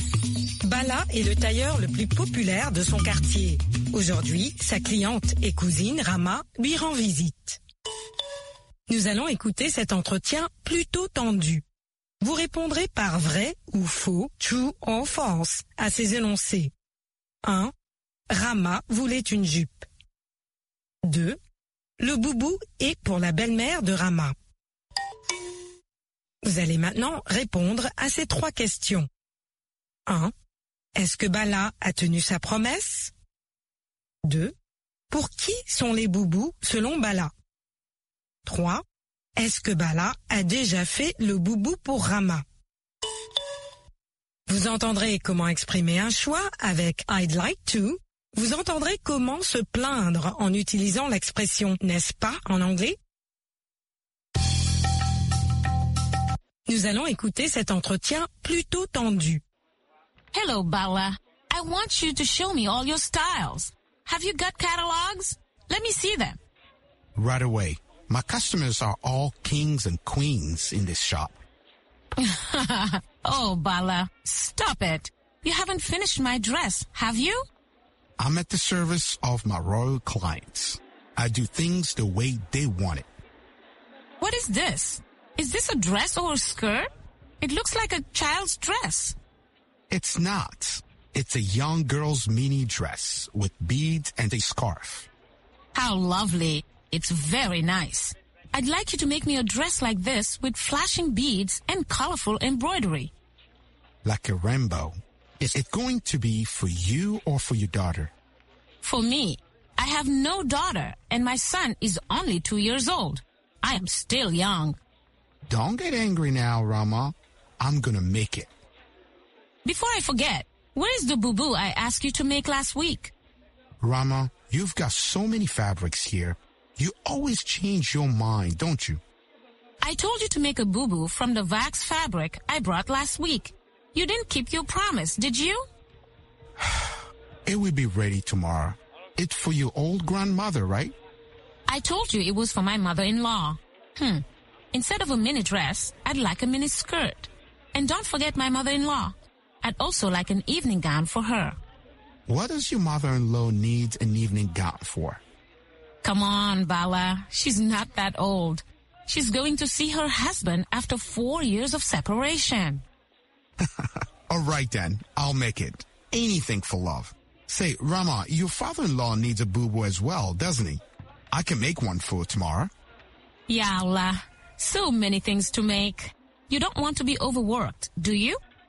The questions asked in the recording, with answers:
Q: Le boubou est pour la belle-mère de Rama.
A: L'énoncé 2 est vrai. Le boubou est pour la belle-mère de Rama.

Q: Est-ce que Bala a tenu sa promesse?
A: Non.

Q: Pour qui sont les boubous selon Bala?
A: Pour les personnes âgées.

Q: Est-ce que Bala a déjà fait le boubou pour Rama?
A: Pas encore.